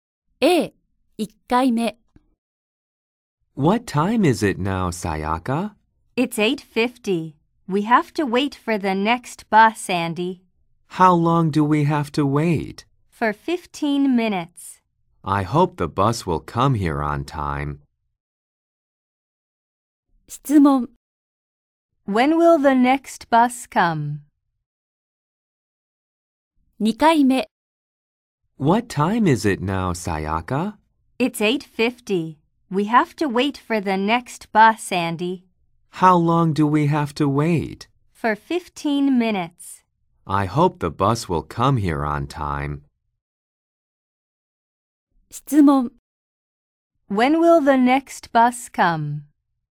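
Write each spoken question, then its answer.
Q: When will the next bus come?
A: At 9:05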